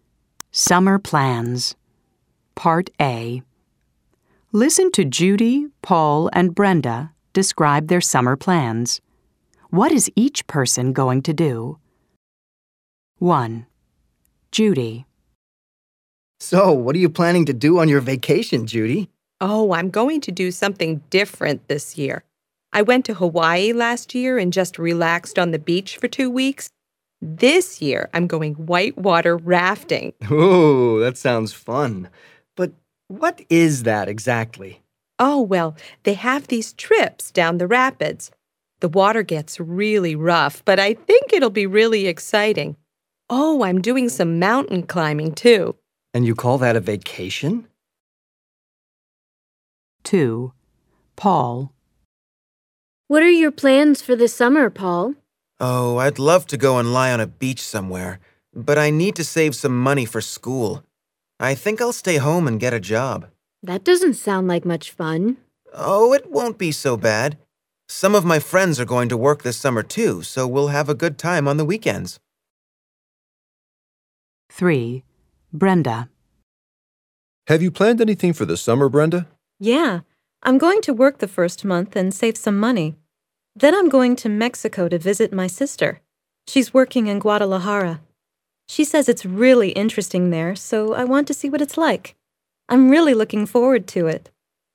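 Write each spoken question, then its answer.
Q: What is each person going to do? 1. Judy.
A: Go whitewater rafting and mountain climbing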